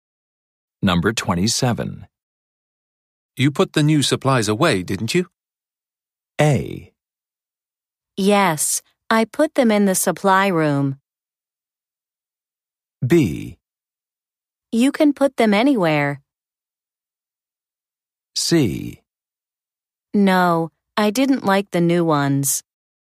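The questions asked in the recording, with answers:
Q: You put the new supplies away, didn't you?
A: A: Yes, I put them in the supply room.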